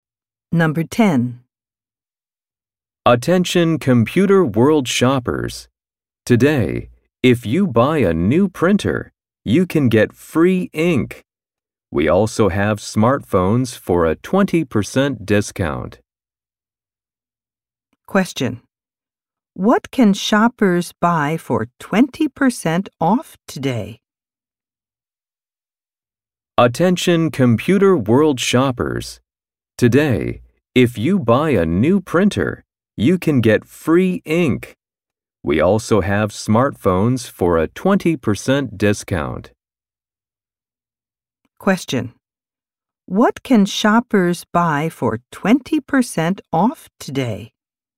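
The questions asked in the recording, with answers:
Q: What can shoppers buy for 20% off today?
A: Smartphones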